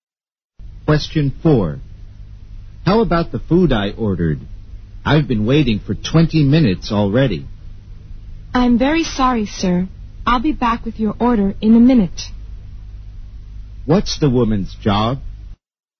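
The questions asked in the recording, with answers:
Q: What's the woman's job?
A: A waitress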